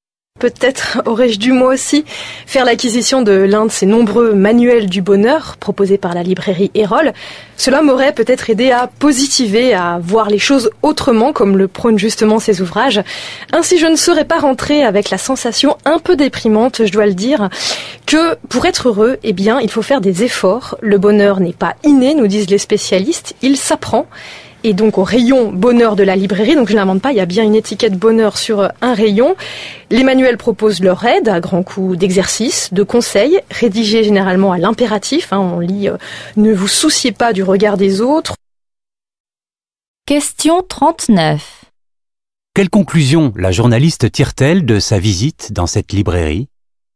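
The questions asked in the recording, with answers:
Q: Quelle conclusion la journaliste tire-t-elle de sa visite dans cette librairie?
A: Pour être heureux, il faut faire des efforts : le bonheur n'est pas inné, il s'apprend.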